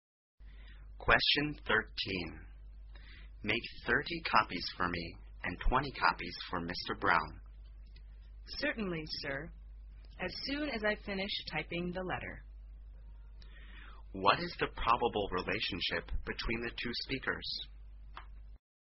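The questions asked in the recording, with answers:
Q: What is the probable relationship between the two speakers?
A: Boss and secretary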